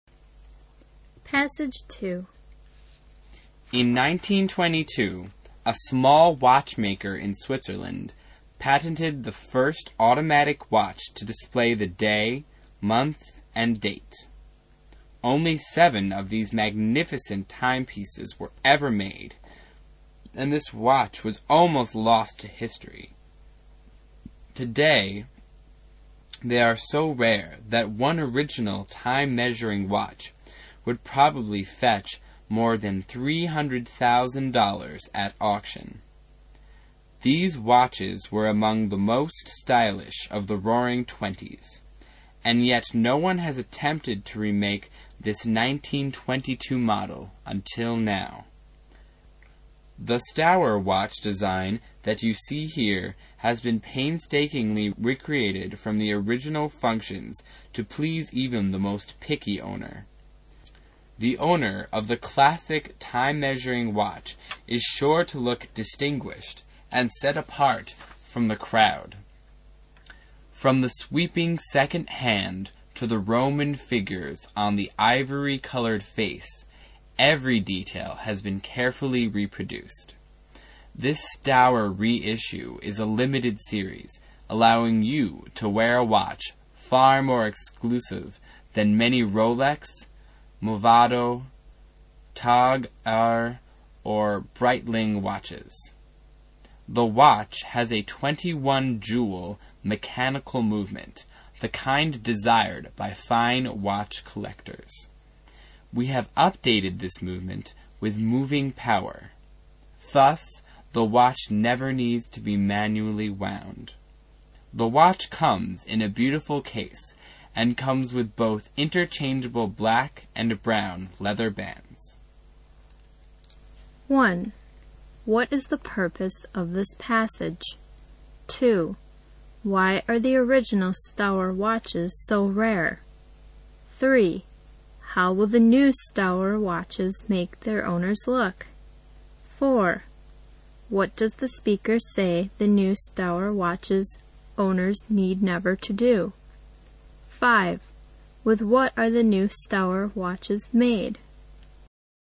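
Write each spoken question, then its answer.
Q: What is the purpose of this passage?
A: To advertise the reissued Staur watch

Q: Why are the original Staur watches so rare?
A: Only 7 were ever made

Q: How will the new Staur watches make their owners look?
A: Distinguished and set apart from the crowd

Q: What does the speaker say the new Staur watches owners need never to do?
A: Wind the watch manually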